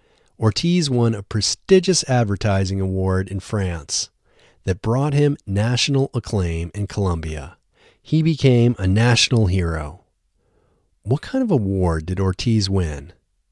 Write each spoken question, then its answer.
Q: What kind of award did Ortiz win?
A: Ortiz won a prestigious advertising award.